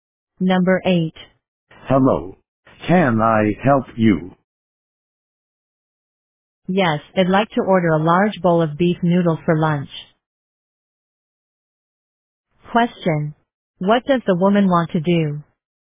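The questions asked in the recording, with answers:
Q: What does the woman want to do?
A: Order a large bowl of beef noodles for lunch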